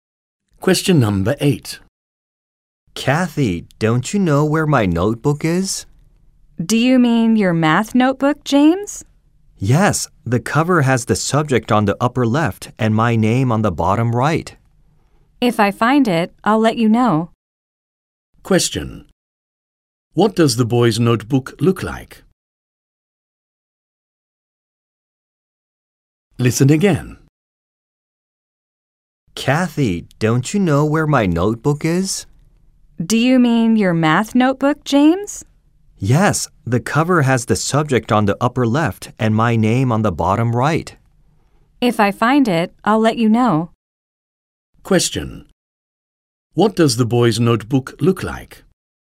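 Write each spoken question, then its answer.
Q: Question. What does the boy's notebook look like?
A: A math notebook with the subject on the upper left of the cover and his name on the bottom right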